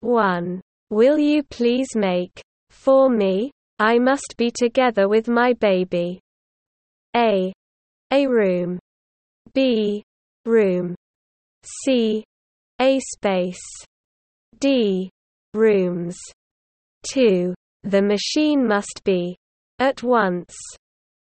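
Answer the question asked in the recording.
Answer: B: room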